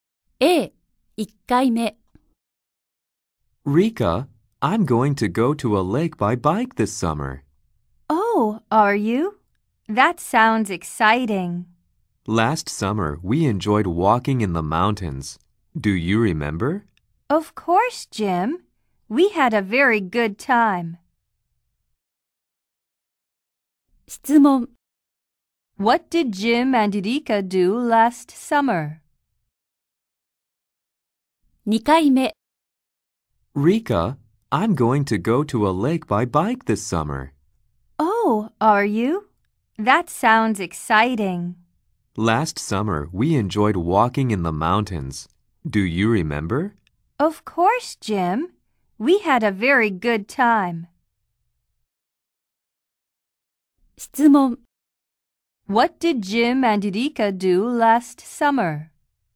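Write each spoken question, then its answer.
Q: What did Jim and Rika do last summer?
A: They walked in the mountains.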